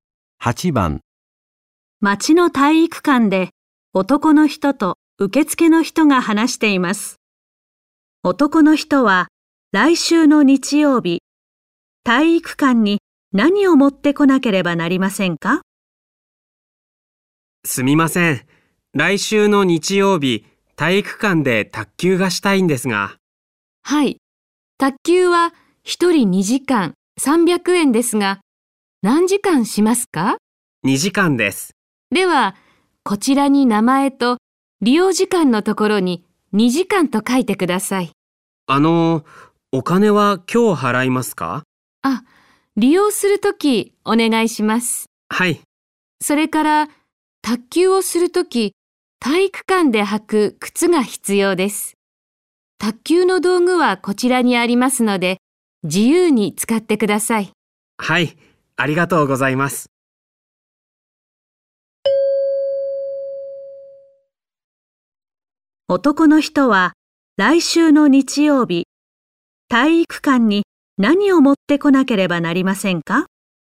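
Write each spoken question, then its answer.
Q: 男の人は、来週の日曜日、体育館に何を持ってこなければなりませんか?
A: お金(300円)と体育館で履く靴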